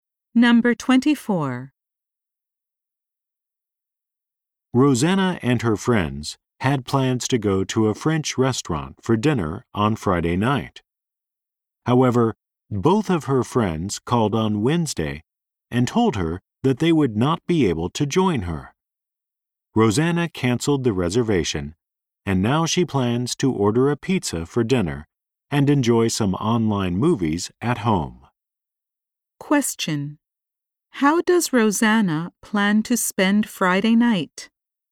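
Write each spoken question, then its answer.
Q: How does Rosanna plan to spend Friday night?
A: By ordering pizza and watching online movies at home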